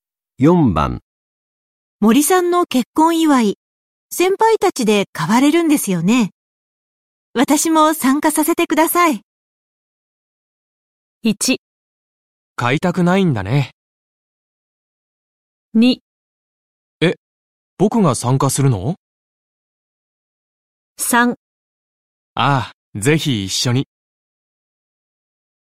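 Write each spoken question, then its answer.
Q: 森さんの結婚祝い、先輩たちで買われるんですよね。私も参加させてください。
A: 3: ああ、ぜひ一緒に。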